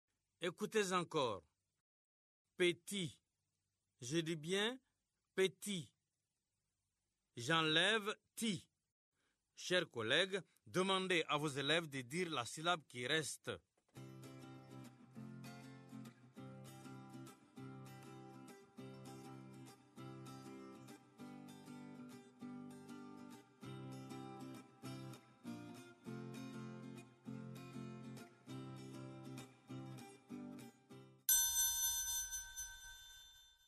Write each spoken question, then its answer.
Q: Chers collègues, demandez à vos élèves de dire la syllabe qui reste.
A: Il reste P.